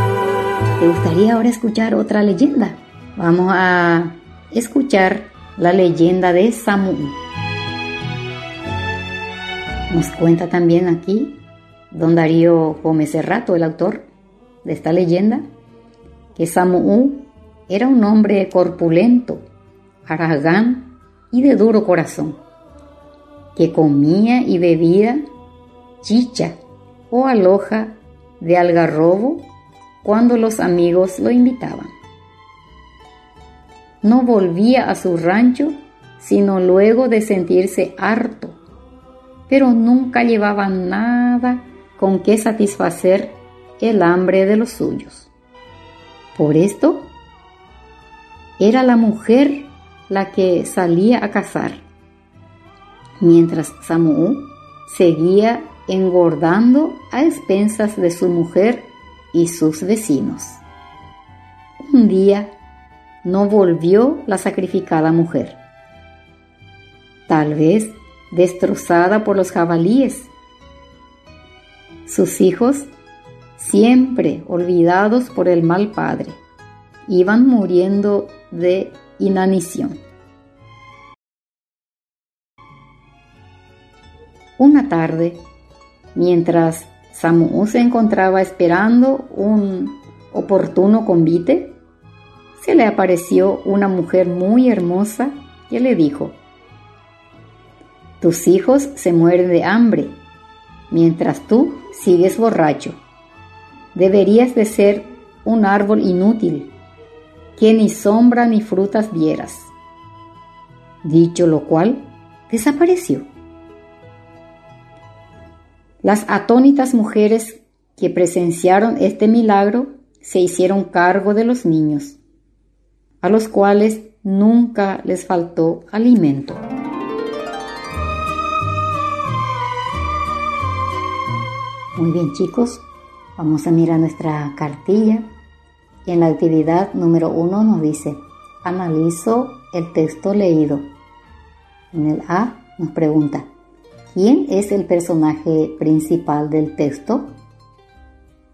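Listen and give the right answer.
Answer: Samu'u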